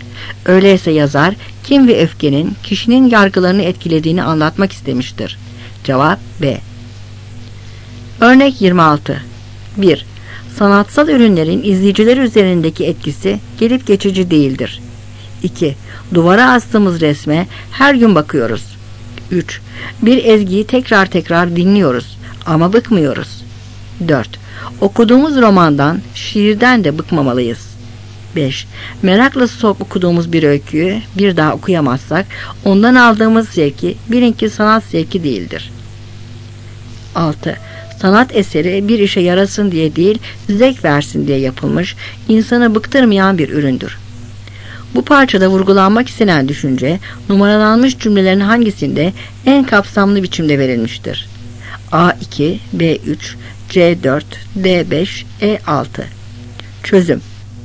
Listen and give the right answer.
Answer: Cevap E.